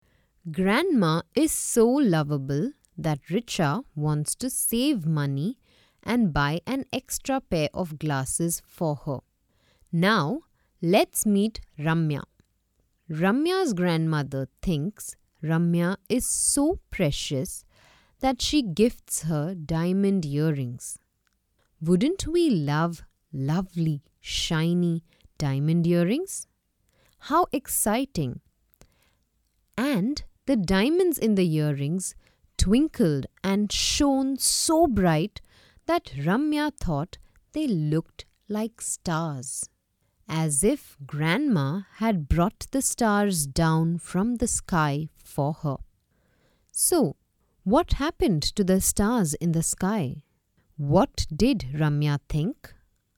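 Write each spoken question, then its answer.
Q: What did Ramya think?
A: She thought the diamonds in her earrings looked like stars, as if Grandma had brought the stars down from the sky for her.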